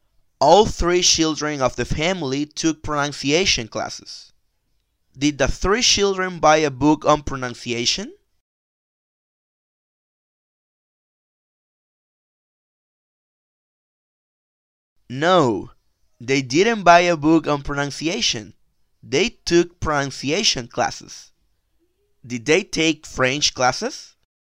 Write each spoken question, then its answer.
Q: Did they take French classes?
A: No, they didn't take French classes.